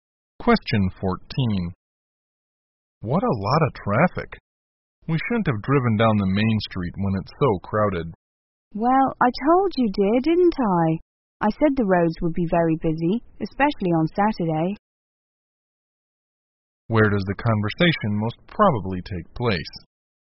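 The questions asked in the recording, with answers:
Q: Where does the conversation most probably take place?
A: In a car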